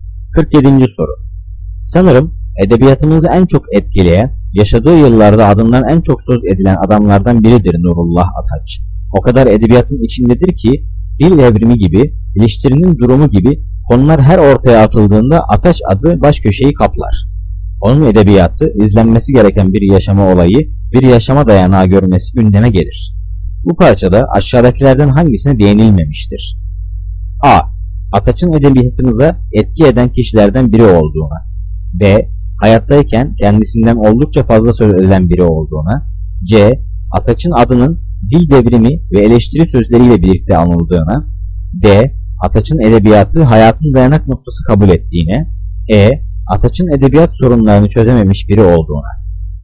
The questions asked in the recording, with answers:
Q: Bu parçada aşağıdakilerden hangisine değinilmemiştir?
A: Cevap E. Ataç'ın edebiyat sorunlarını çözememiş biri olduğuna.